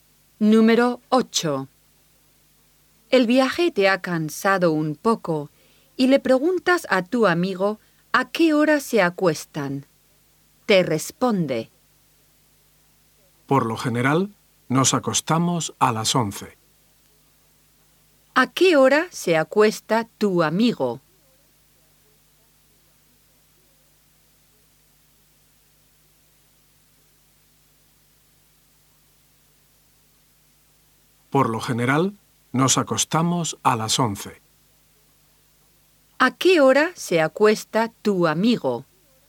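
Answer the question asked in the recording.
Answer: A las 11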